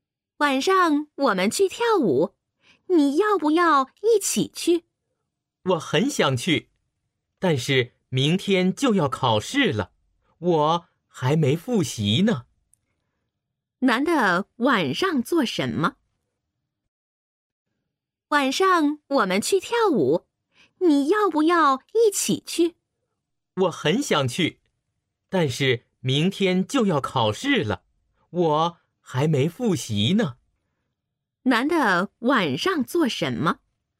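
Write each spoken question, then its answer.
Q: 男的晚上做什么?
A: 复习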